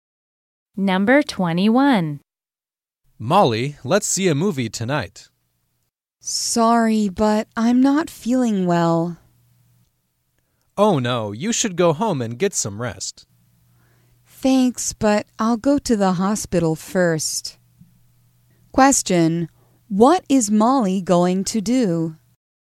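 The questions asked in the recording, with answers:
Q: what is Molly going to do?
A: Go to the hospital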